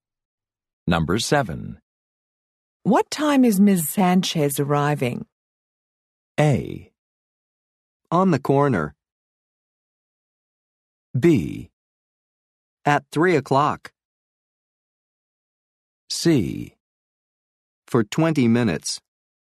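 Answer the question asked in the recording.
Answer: B: At 3 o'clock.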